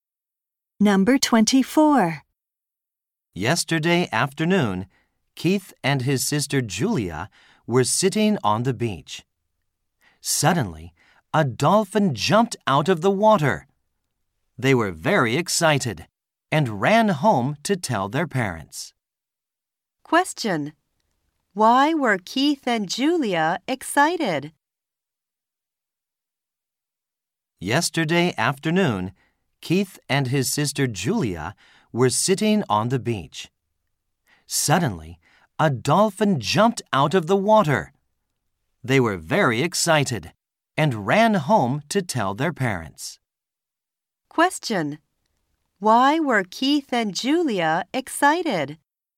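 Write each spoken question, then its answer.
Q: Why were Keith and Julia excited?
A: They saw a dolphin jump out of the water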